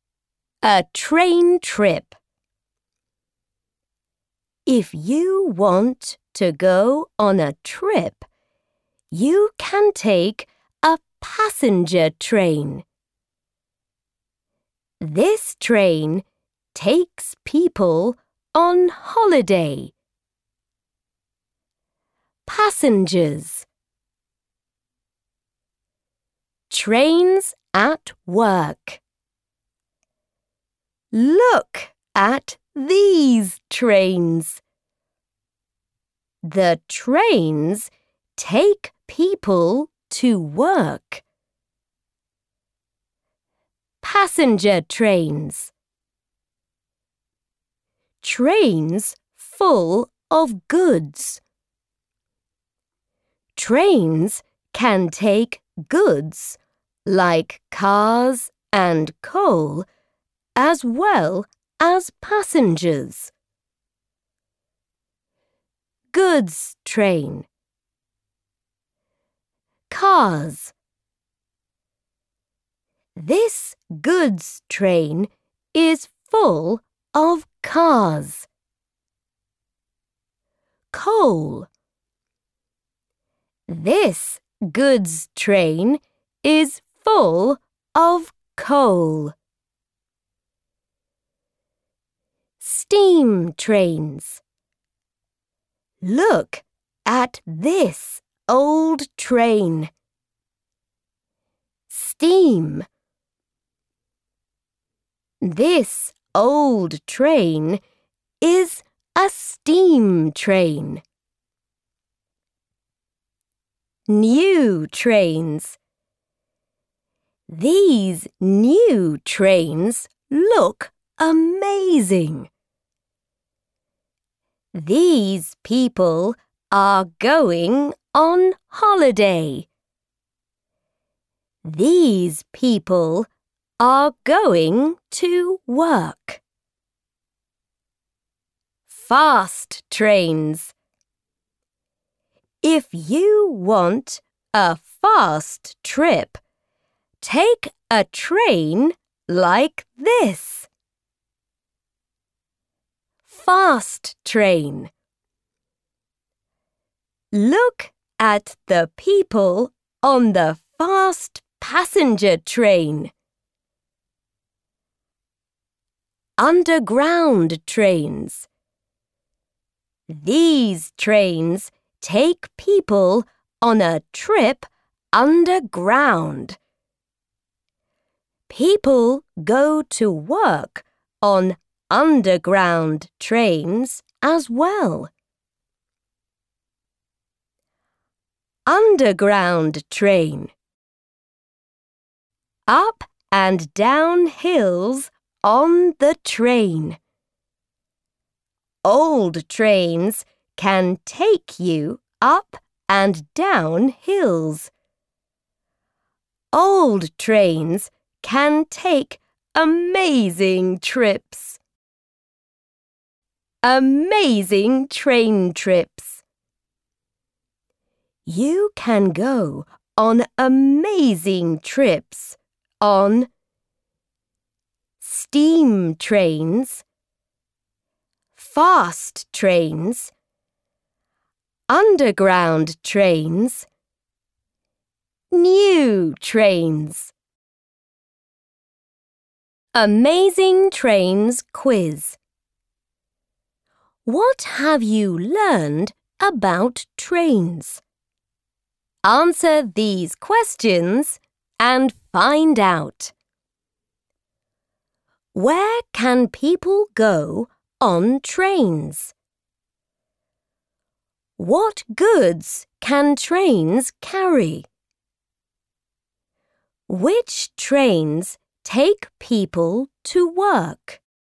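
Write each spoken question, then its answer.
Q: Where can people go on trains?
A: On holiday, to work, on trips

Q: What goods can trains carry?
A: Cars and coal

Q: Which trains take people to work?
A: Passenger trains and underground trains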